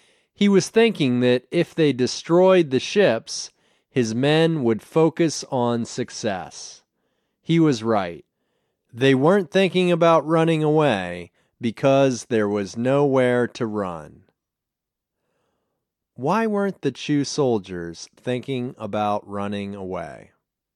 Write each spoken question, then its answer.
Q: Why weren't the Chu soldiers thinking about running away?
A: They weren't thinking about running away because there was nowhere to run.